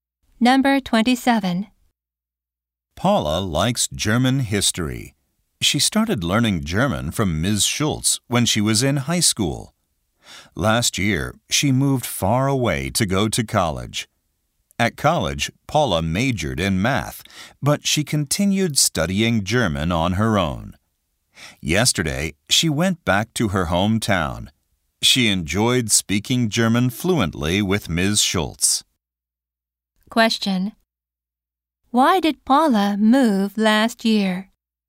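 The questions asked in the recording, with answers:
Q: Question. Why did Paula move last year?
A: To go to college.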